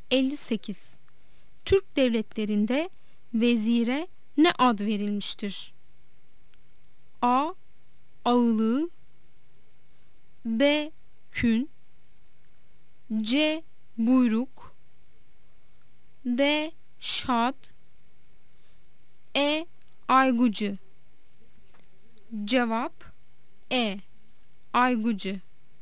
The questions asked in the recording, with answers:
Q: Türk devletlerinde vezire ne ad verilmiştir?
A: Cevap E. Aygucu.